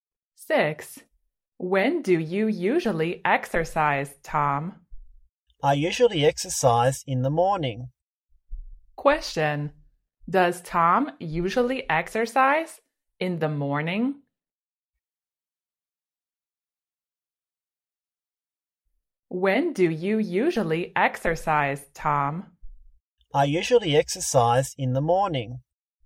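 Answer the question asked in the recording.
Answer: Yes, he does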